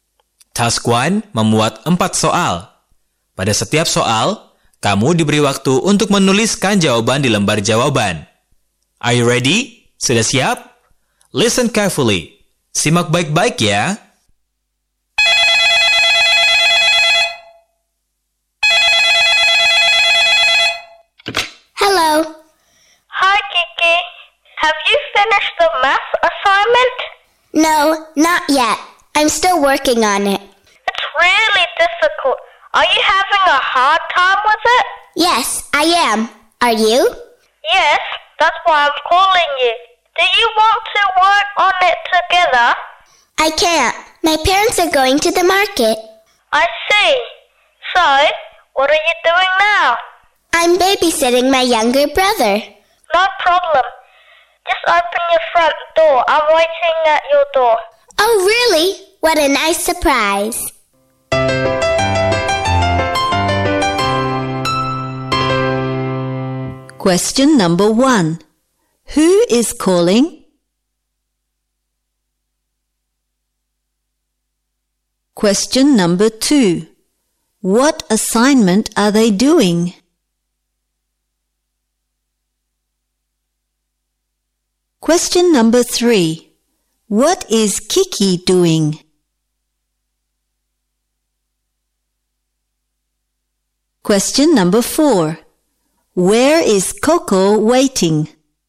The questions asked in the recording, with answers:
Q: Who is calling?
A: Coco.

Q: What assignment are they doing?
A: Math.

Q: What is Kiki doing?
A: Kiki is babysitting her younger brother.